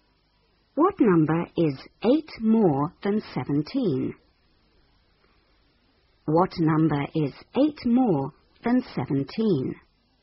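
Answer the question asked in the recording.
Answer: 25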